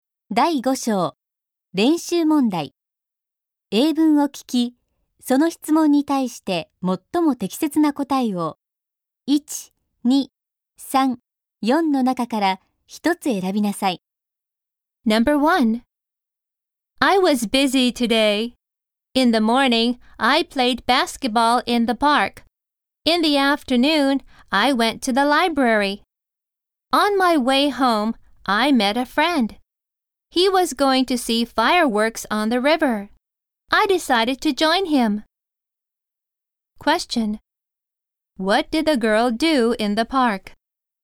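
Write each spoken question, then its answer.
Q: What did the girl do in the park?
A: She played basketball.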